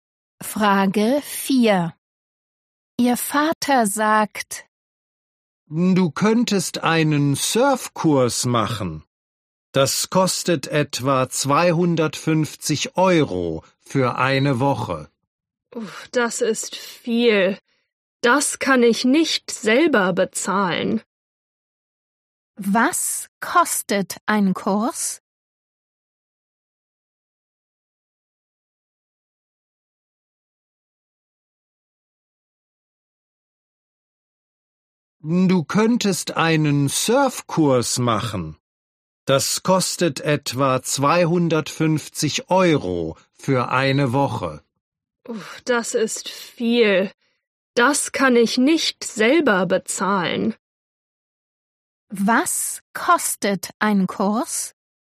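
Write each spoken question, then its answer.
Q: Was kostet ein Kurs?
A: etwa 250 Euro für eine Woche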